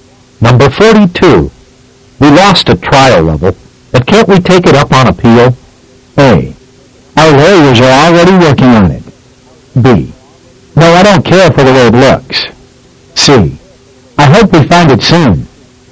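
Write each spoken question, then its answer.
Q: We lost at trial level, but can't we take it up on appeal?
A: A: Our lawyers are already working on it.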